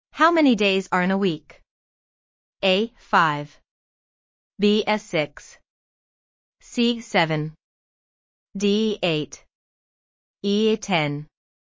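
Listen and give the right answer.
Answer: C: 7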